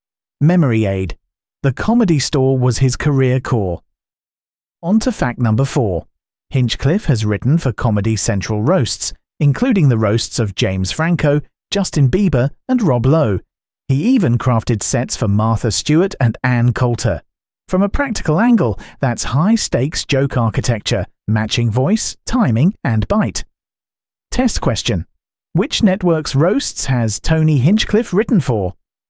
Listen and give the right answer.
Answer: Correct answer, Comedy Central.